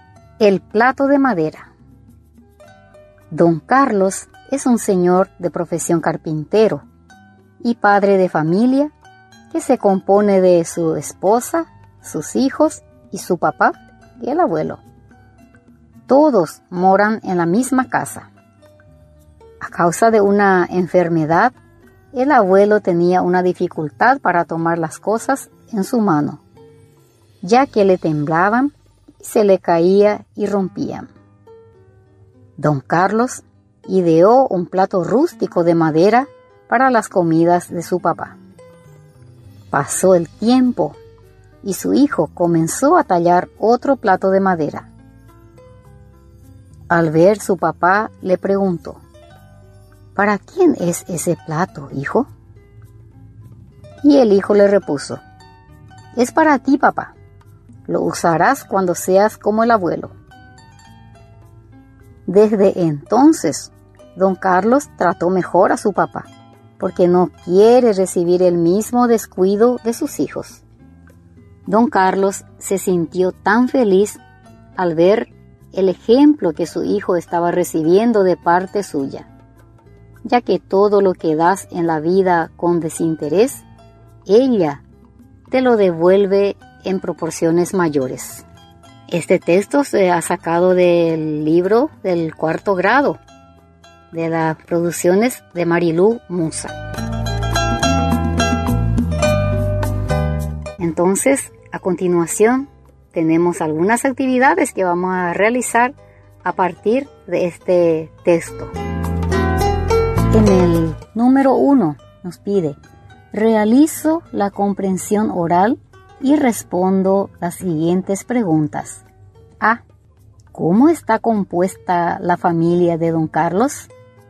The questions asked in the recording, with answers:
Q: ¿Cómo está compuesta la familia de don Carlos?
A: a don Carlos, su esposa, sus hijos, su papá.